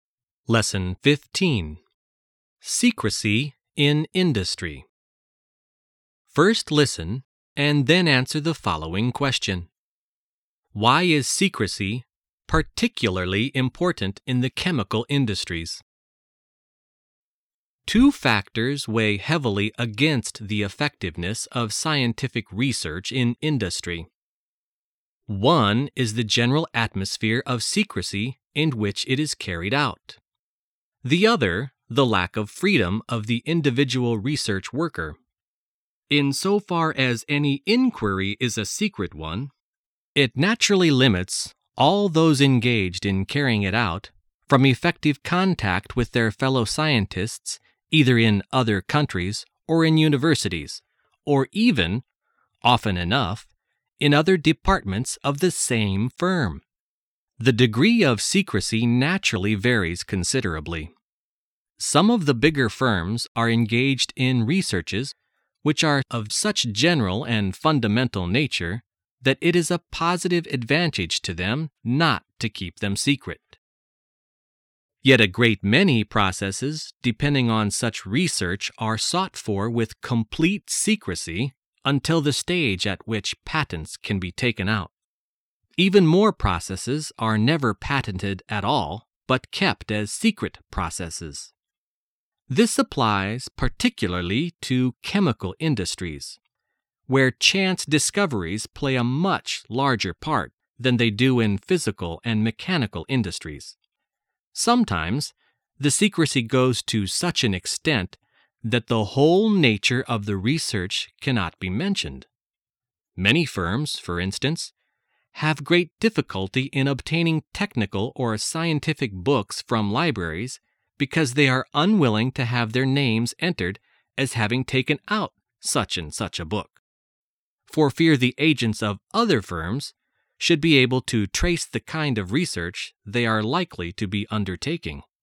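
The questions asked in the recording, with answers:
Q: Why is secrecy particularly important in the chemical industries?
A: Because chance discoveries play a much larger part there than in physical and mechanical industries.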